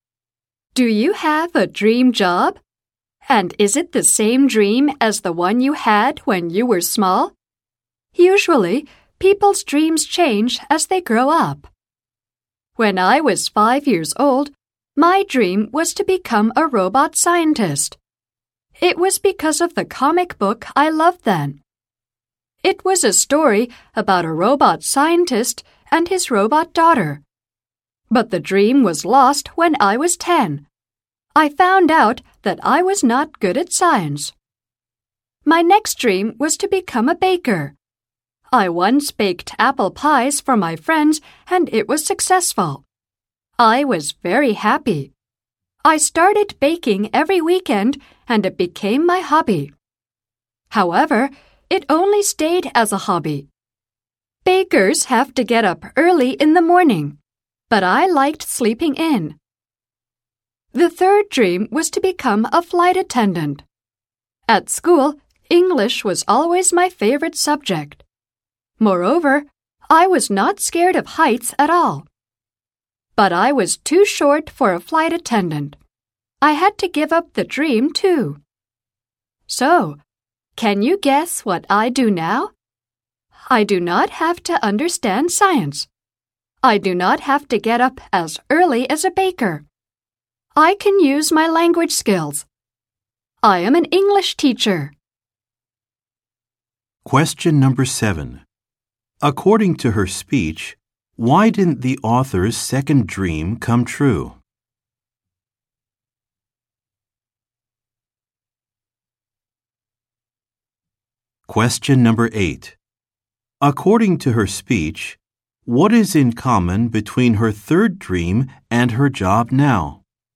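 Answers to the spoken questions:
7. Bakers must get up early, but she liked sleeping in
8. Both use English (language skills)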